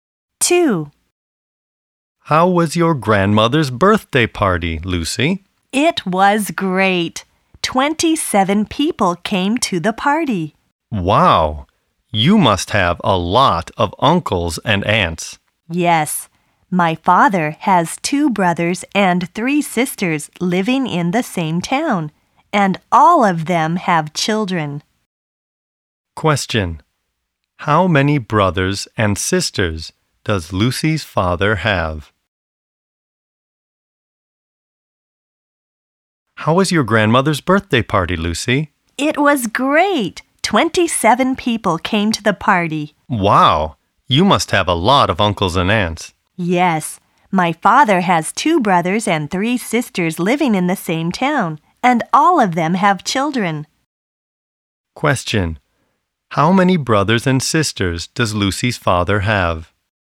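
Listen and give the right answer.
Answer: Five (2 brothers and 3 sisters)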